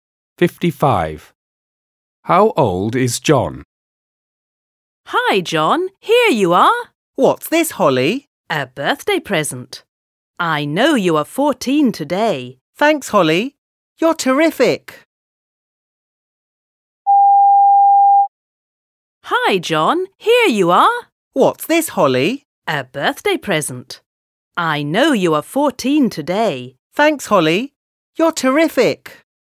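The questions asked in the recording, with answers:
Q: How old is John?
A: 14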